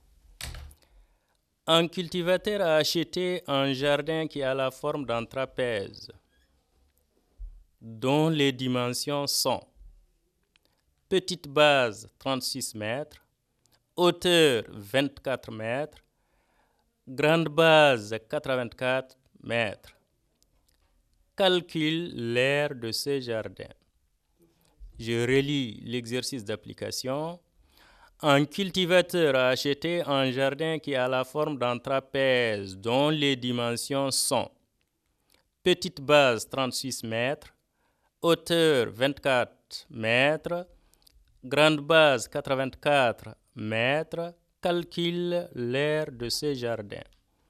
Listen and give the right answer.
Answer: c'est égal à 1440 mètres carrés.